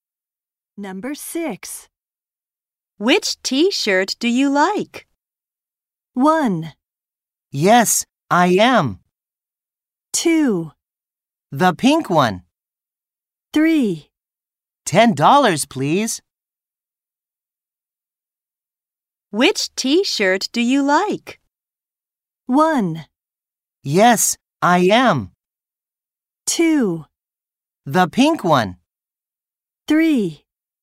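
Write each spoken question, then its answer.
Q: Which t-shirt do you like?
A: 2: The pink one.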